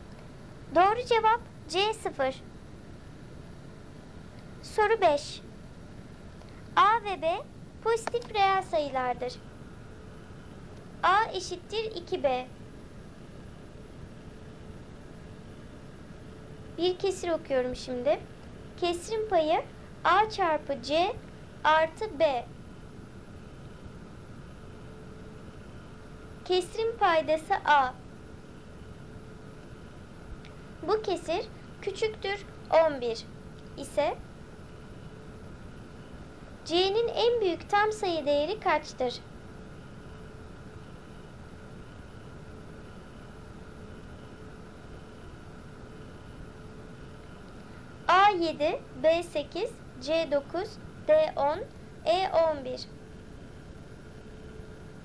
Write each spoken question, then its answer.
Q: C'nin en büyük tam sayı değeri kaçtır?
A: Doğru cevap D 10.